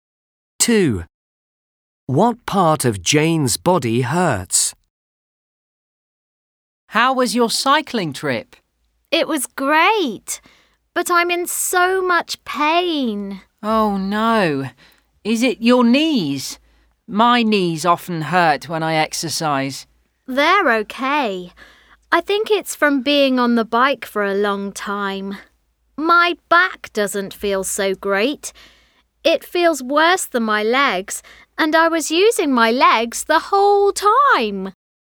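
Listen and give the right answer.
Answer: Her back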